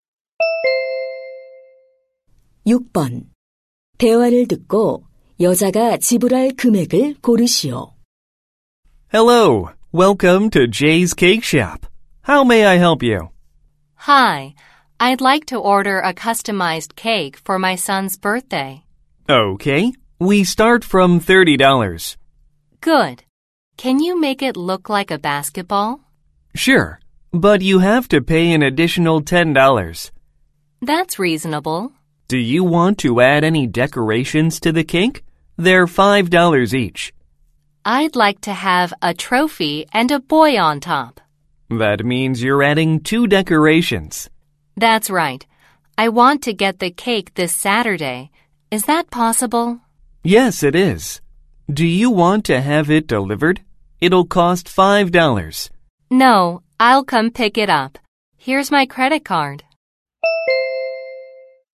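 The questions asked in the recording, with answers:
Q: 대화를 듣고 여자가 지불할 금액을 고르시오.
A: 50달러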